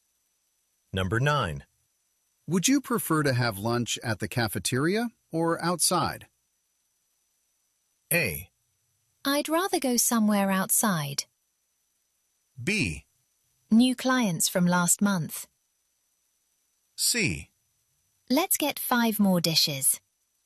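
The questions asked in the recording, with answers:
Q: Would you prefer to have lunch at the cafeteria or outside?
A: A: I'd rather go somewhere outside.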